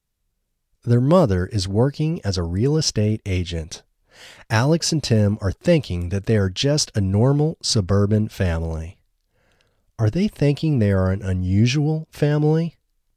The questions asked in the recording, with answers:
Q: Are they thinking they are an unusual family?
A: No, they aren't thinking they are an unusual family.